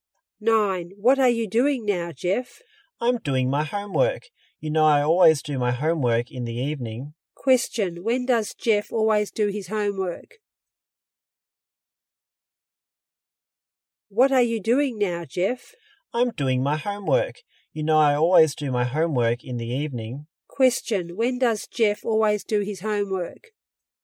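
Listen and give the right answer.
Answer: In the evening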